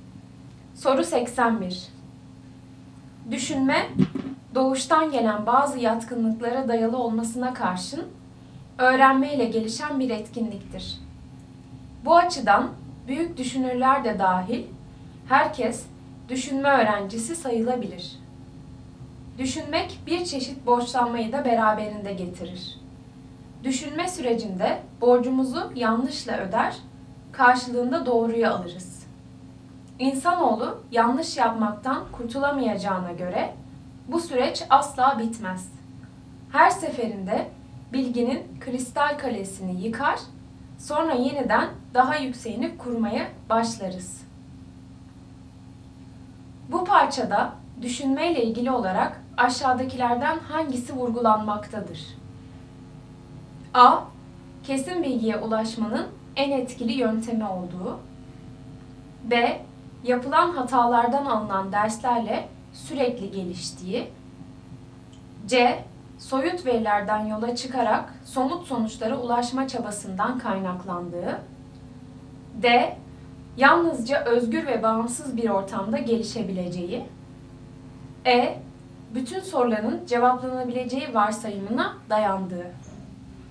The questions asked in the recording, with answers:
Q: Bu parçada düşünmeyle ilgili olarak aşağıdakilerden hangisi vurgulanmaktadır?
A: Doğru cevap B. Yapılan hatalardan alınan derslerle sürekli geliştiği.